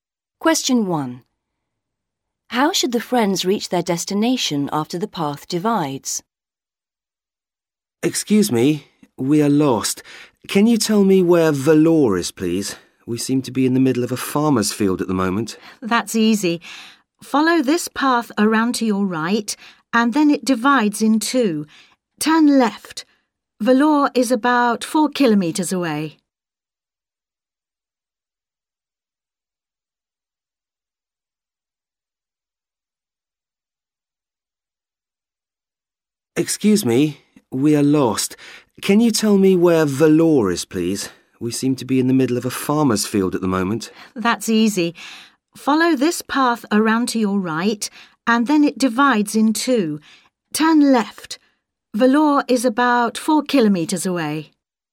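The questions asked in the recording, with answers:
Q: How should the friends reach their destination after the path divides?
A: Turn left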